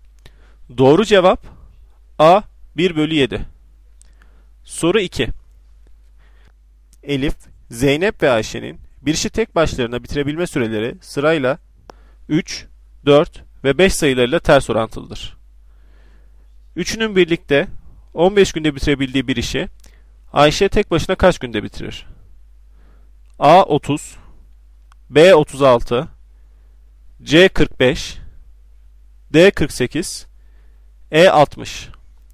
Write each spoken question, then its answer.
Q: Üçünün birlikte 15 günde bitirebildiği bir işi Ayşe tek başına kaç günde bitirir?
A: Doğru cevap B 36.